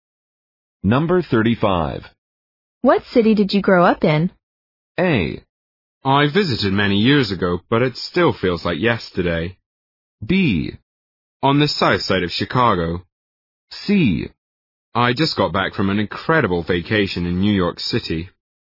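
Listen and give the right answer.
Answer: B: On the south side of Chicago.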